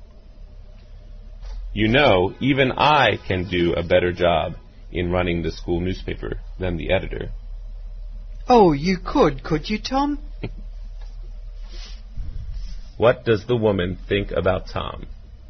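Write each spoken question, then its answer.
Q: What does the woman think about Tom?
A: She doubts he could do a better job.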